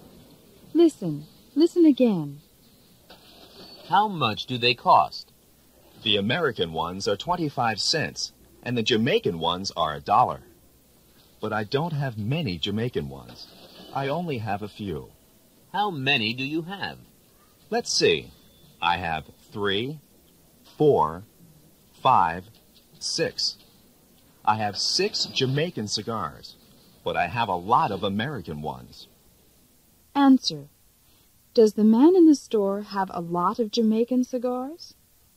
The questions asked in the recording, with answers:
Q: Does the man in the store have a lot of Jamaican cigars?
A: No, he doesn't.